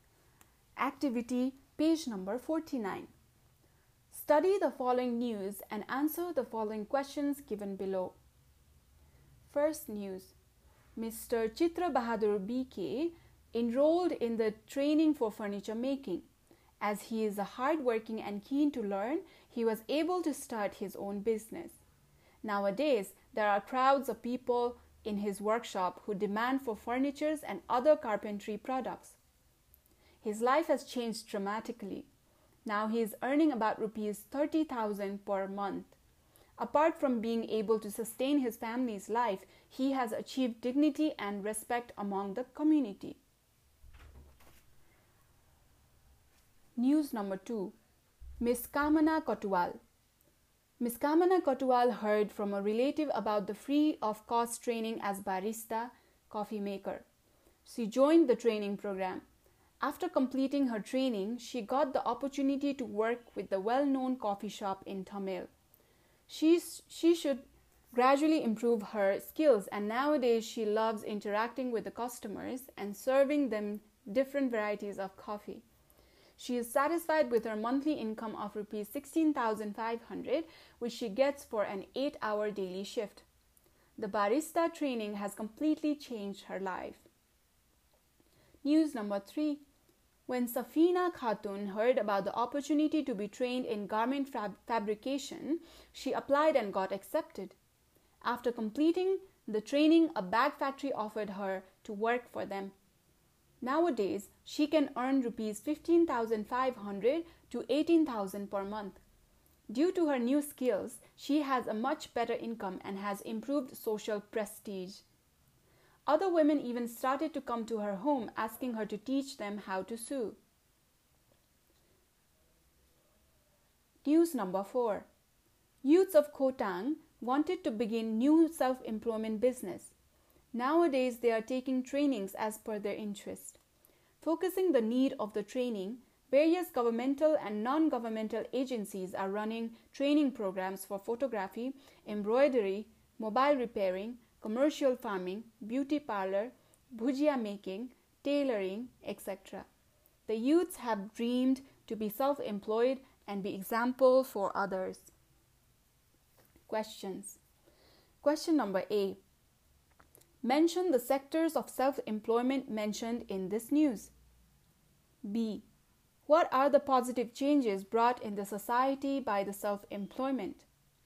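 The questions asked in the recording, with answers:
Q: Mention the sectors of self employment mentioned in this news.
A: Furniture making/carpentry, barista (coffee making), garment fabrication/sewing, photography, embroidery, mobile repairing, commercial farming, beauty parlor, bhujia making, tailoring

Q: What are the positive changes brought in the society by the self employment?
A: Higher income, the ability to support their families, and more dignity, respect and social prestige; others learn skills from them and become self-employed too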